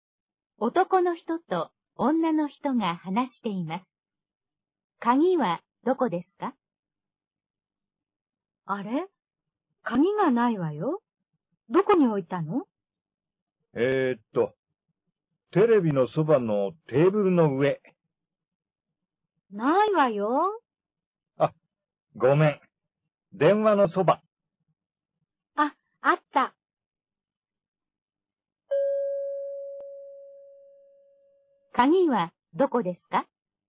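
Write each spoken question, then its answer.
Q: 鍵はどこですか?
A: 電話のそば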